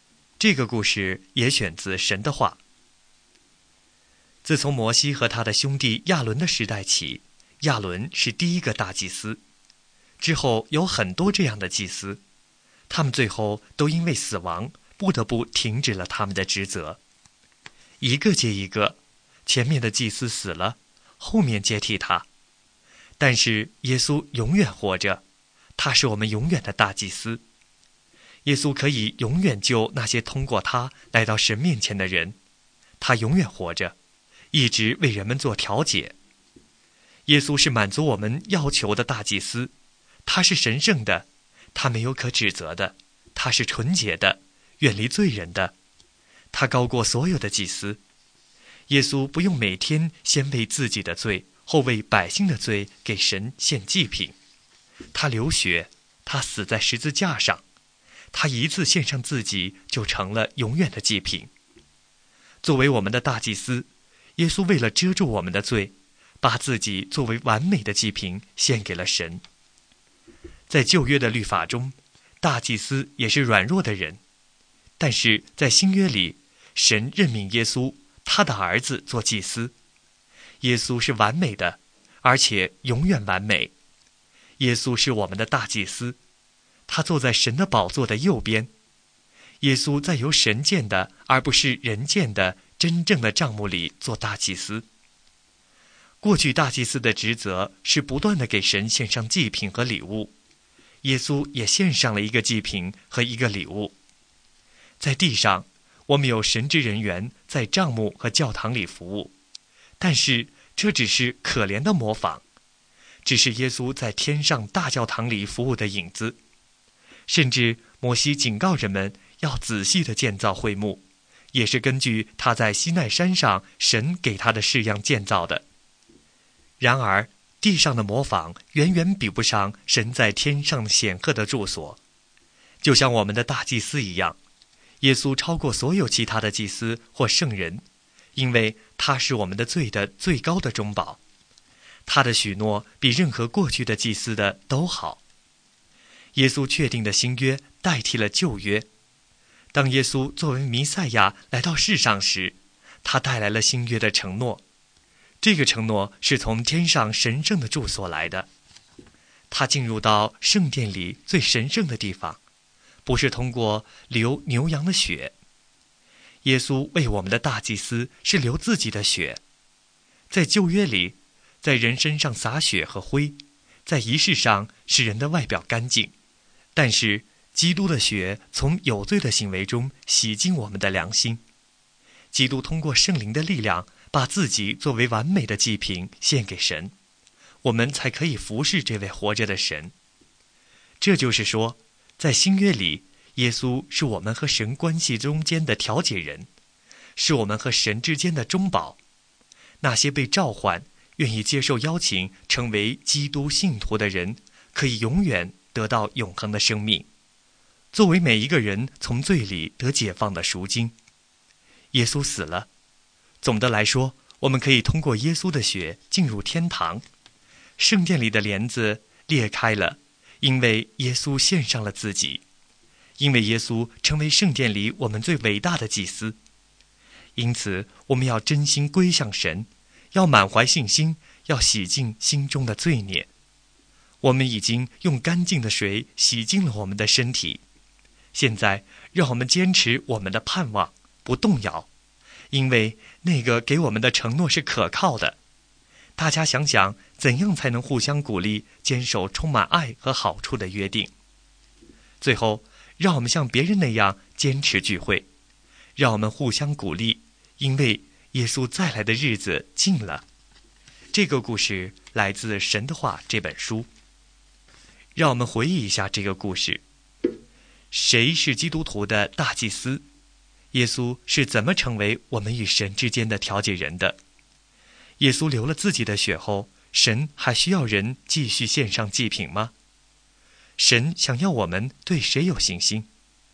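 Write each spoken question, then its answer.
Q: 谁是基督徒的大祭司?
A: 耶稣

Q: 耶稣是怎么成为我们与神之间的调解人的?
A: 他流自己的血,把自己作为完美的祭品献给神

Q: 耶稣流了自己的血后,神还需要人继续献上祭品吗?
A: 不需要,耶稣一次献上自己就成了永远的祭品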